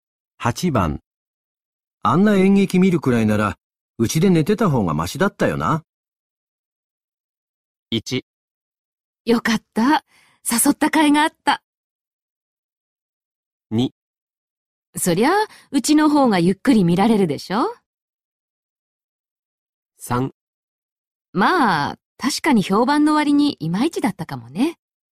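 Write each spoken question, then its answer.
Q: あんな演劇見るくらいなら、うちで寝てた方がマシだったよな。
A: 3: まあ、確かに評判の割にいまいちだったかもね。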